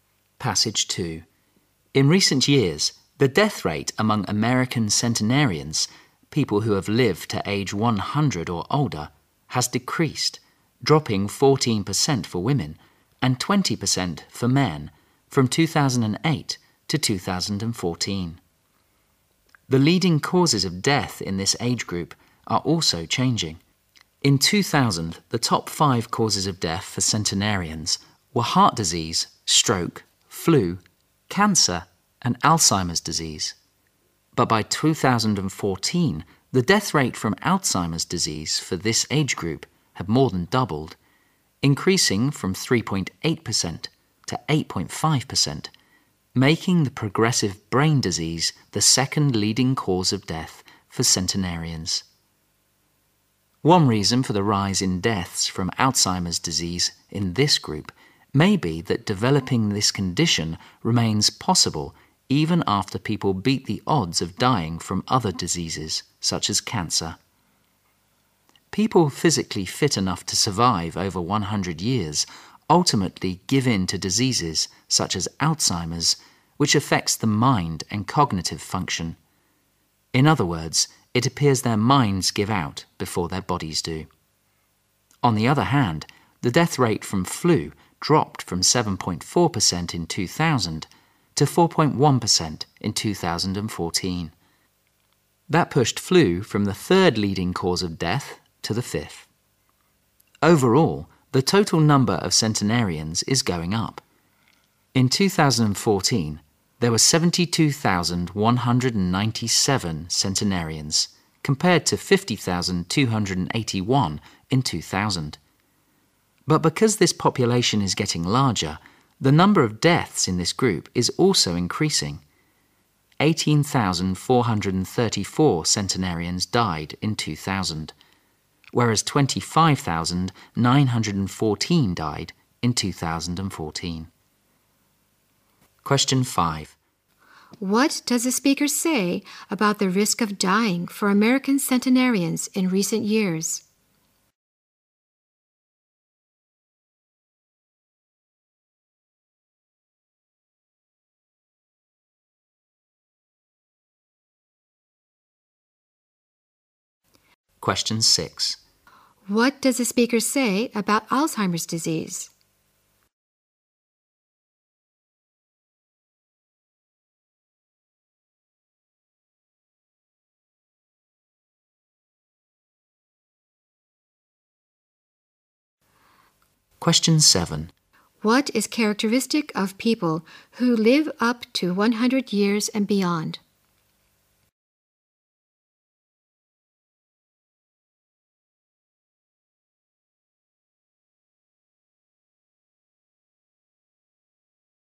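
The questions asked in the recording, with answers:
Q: What does the speaker say about the risk of dying for American centenarians in recent years?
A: It has decreased.

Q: What does the speaker say about Alzheimer's disease?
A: It became the second leading cause of death for centenarians.

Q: What is characteristic of people who live up to 100 years and beyond?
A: Their minds give out before their bodies do.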